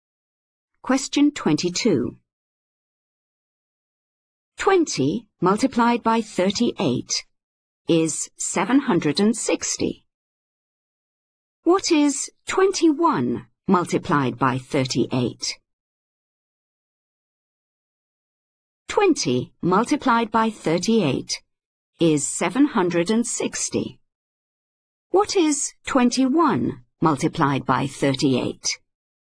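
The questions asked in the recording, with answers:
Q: What is 21 multiplied by 38?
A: 798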